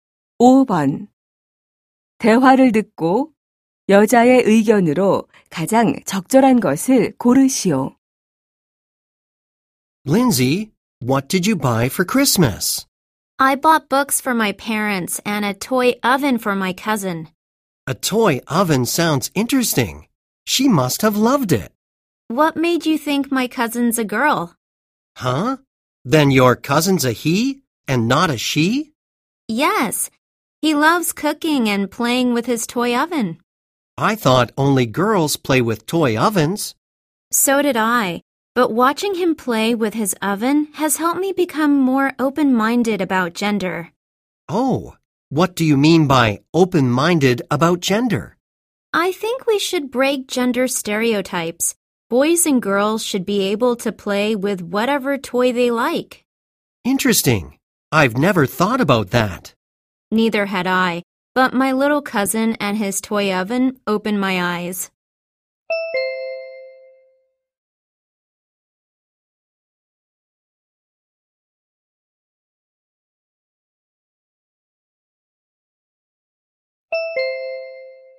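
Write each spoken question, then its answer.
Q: 대화를 듣고 여자의 의견으로 가장 적절한 것을 고르시오.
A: 성 고정관념을 깨고 아이들이 원하는 장난감을 가지고 놀게 해야 한다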